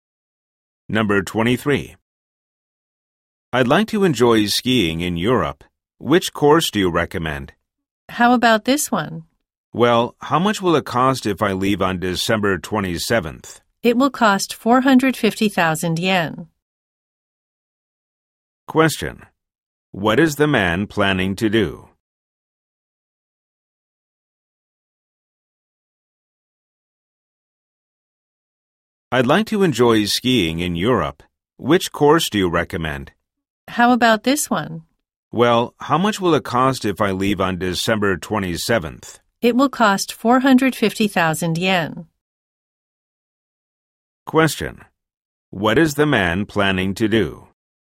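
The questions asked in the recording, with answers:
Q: What is the man planning to do?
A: Go skiing in Europe.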